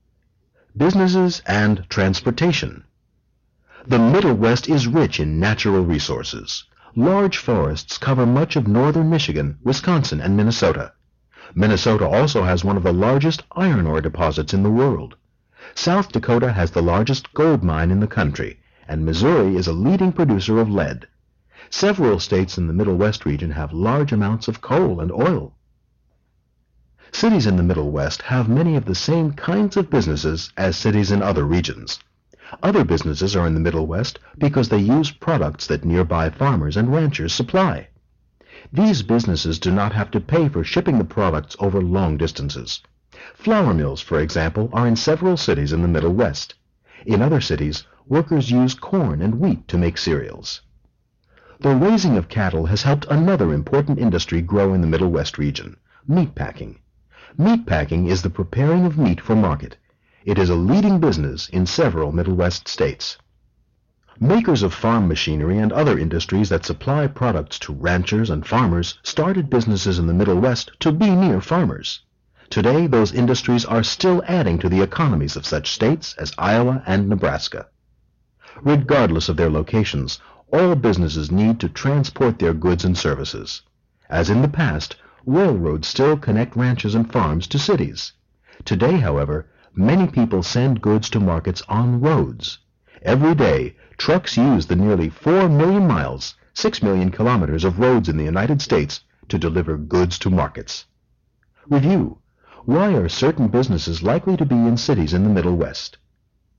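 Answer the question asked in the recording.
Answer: They use products that nearby farmers and ranchers supply, so they don't have to pay to ship them over long distances.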